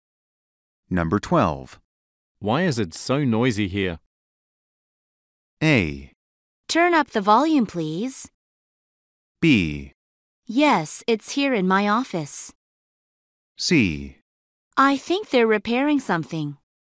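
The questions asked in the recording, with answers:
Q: Why is it so noisy here?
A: C: I think they're repairing something.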